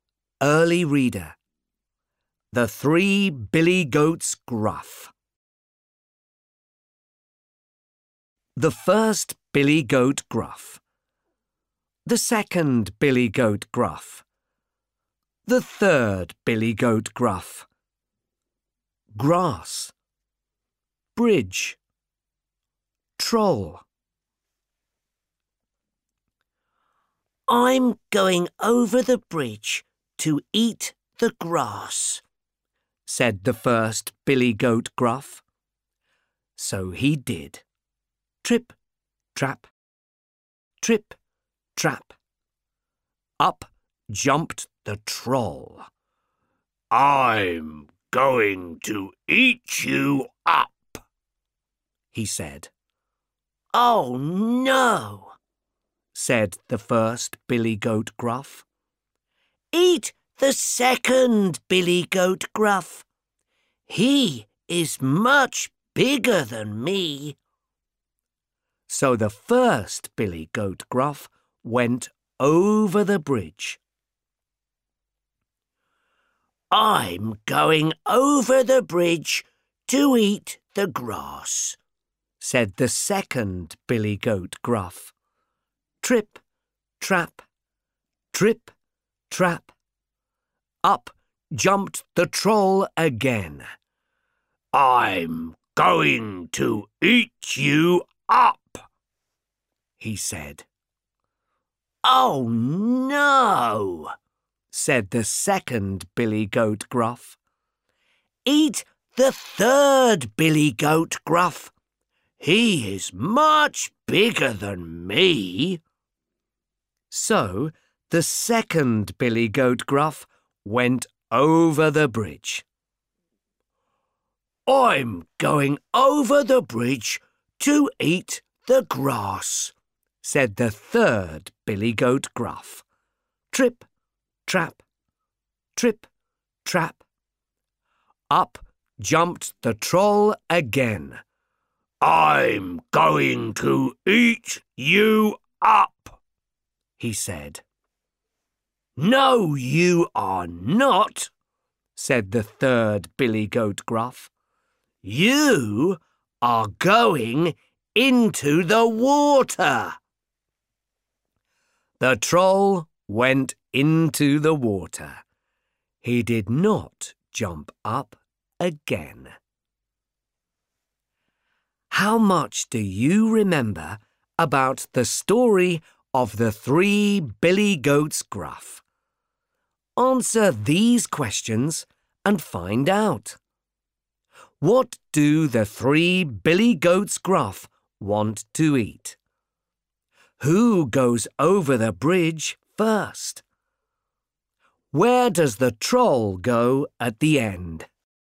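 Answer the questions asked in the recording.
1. The grass
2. The first Billy Goat Gruff
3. Into the water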